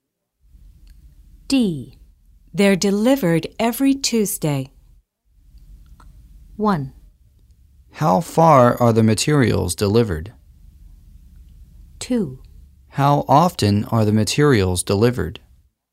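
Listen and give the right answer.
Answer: 2: How often are the materials delivered?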